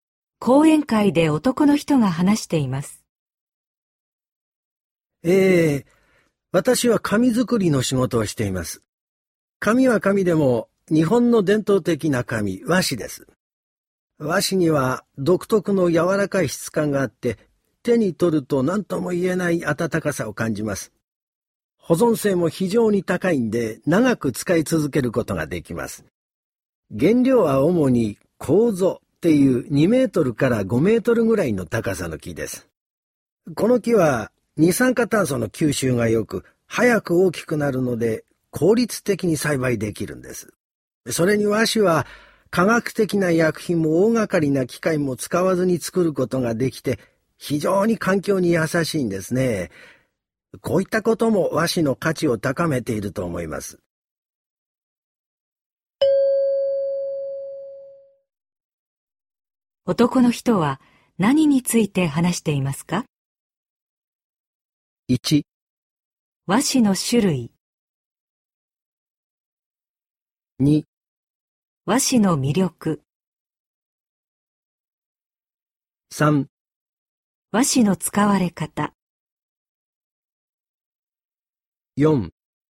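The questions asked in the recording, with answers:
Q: 男の人は何について話していますか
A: 2: 和紙の魅力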